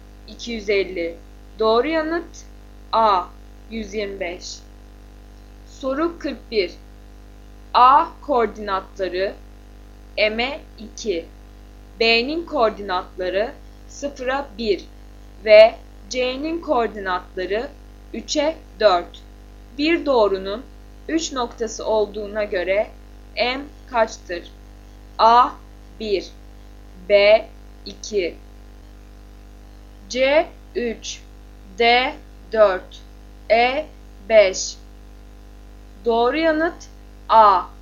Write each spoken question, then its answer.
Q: Bir doğrunun 3 noktası olduğuna göre M kaçtır?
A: Doğru yanıt A. 1